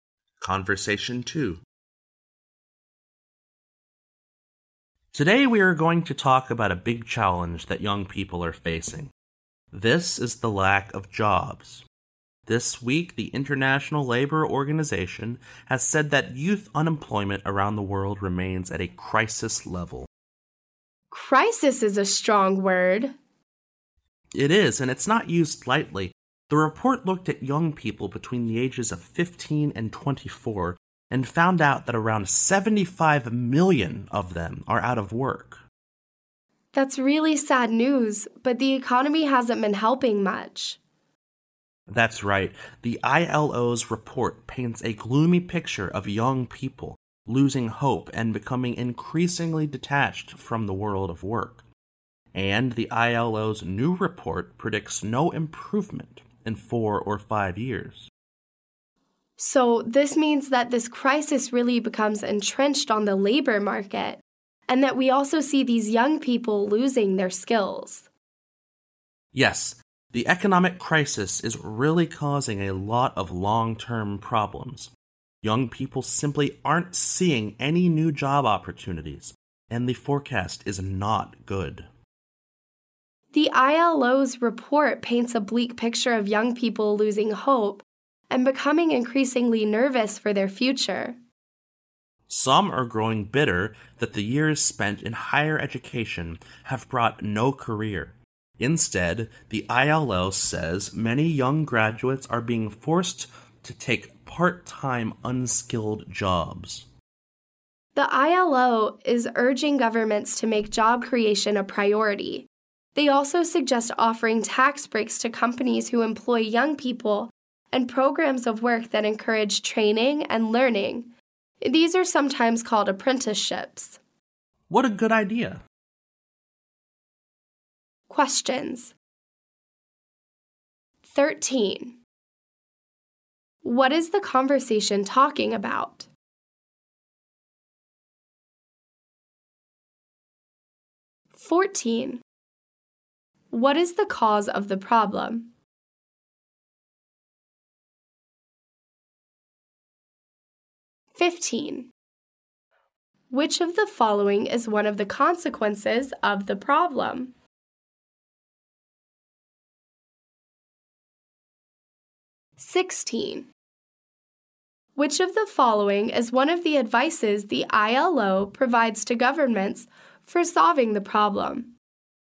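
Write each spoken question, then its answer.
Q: What is the conversation talking about?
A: Youth unemployment / lack of jobs for young people

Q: What is the cause of the problem?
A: The economic crisis / poor economy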